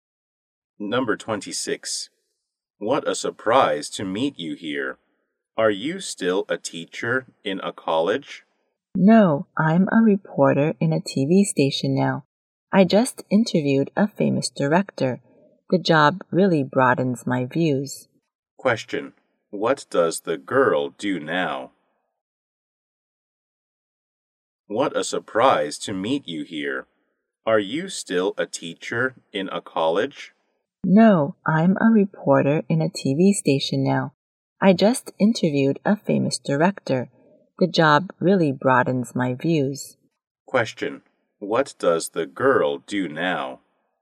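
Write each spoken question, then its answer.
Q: What does the girl do now?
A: A reporter at a TV station.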